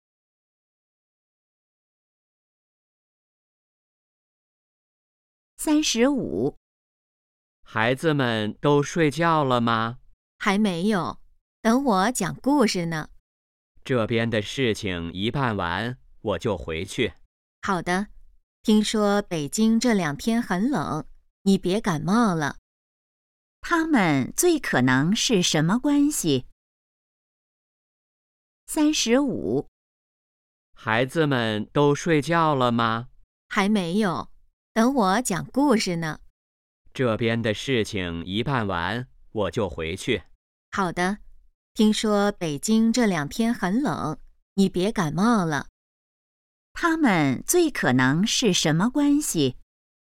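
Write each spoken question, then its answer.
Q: 他们最可能是什么关系?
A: 夫妻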